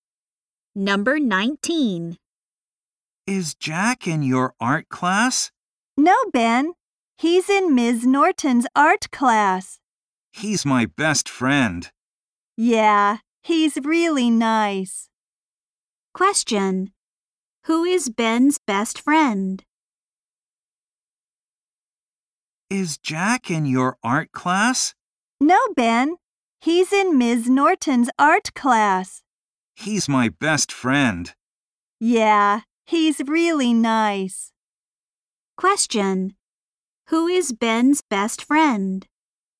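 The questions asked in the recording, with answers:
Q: Who is Ben's best friend?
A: Jack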